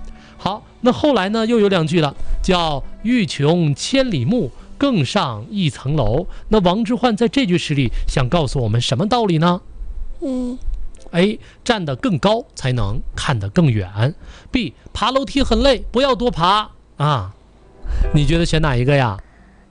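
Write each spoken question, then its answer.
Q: 那王之涣在这句诗里想告诉我们什么道理呢?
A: A: 站得更高才能看得更远。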